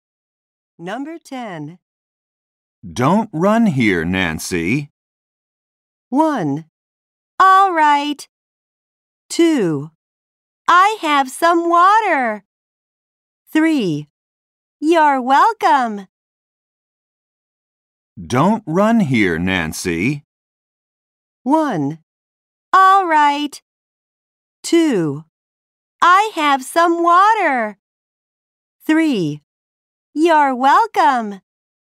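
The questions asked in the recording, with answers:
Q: Don't run here, Nancy.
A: 1: All right.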